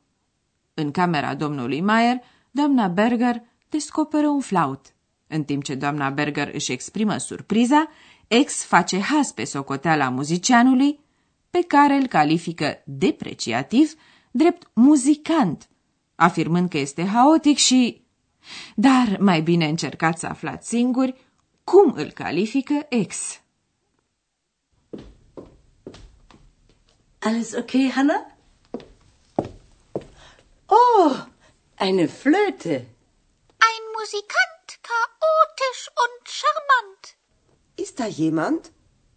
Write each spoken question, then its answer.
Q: Dar mai bine încercați să aflați singuri cum îl califică ex.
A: Ex spune că muzicianul e charmant, adică fermecător, încântător.